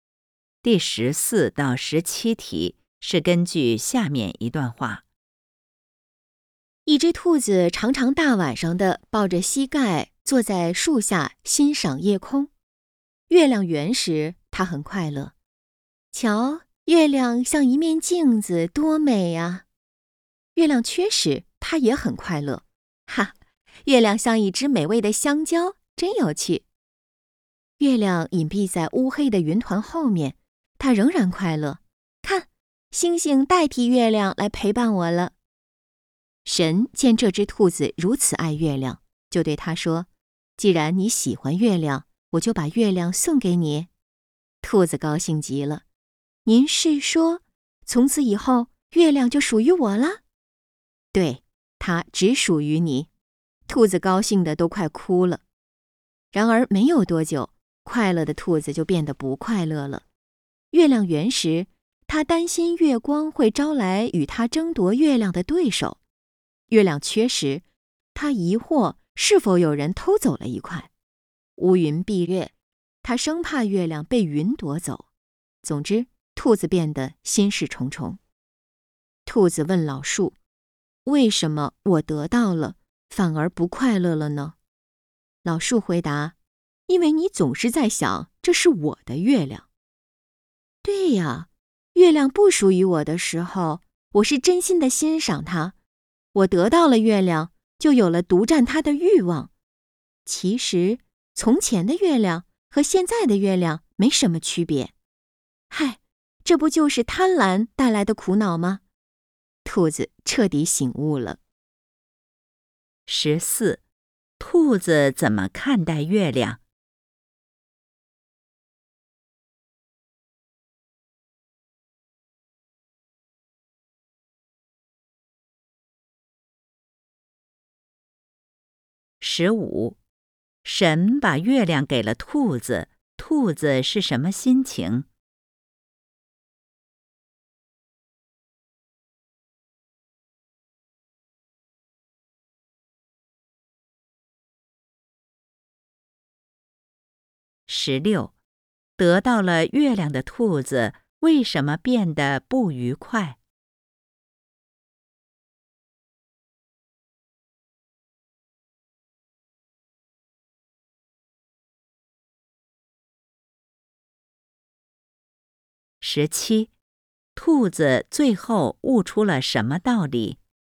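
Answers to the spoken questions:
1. 无论月圆月缺都很喜欢、欣赏月亮
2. 高兴极了
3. 他担心月亮被别人夺走,有了独占的欲望
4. 贪婪会带来苦恼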